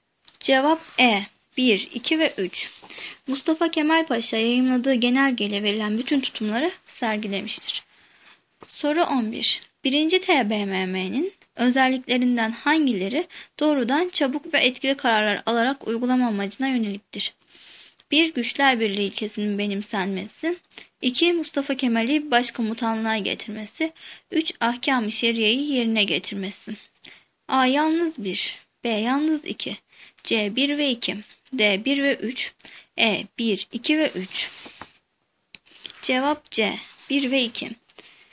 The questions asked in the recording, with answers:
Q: 1. TBMM'nin özelliklerinden hangileri doğrudan çabuk ve etkili kararlar alarak uygulama amacına yöneliktir?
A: Cevap C. 1 ve 2.